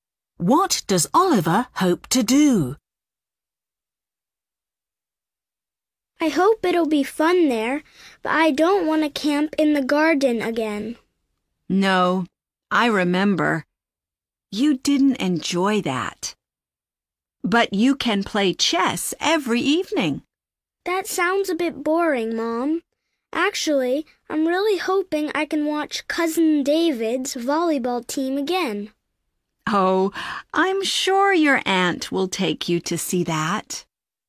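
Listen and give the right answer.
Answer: Watch Cousin David's volleyball team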